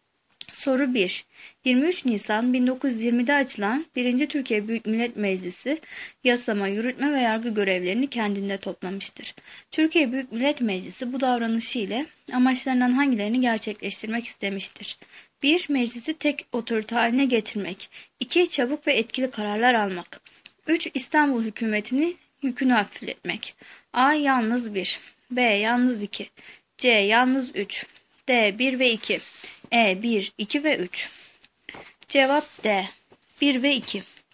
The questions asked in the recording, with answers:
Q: Türkiye Büyük Millet Meclisi bu davranışı ile amaçlarından hangilerini gerçekleştirmek istemiştir?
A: Cevap D. 1 ve 2.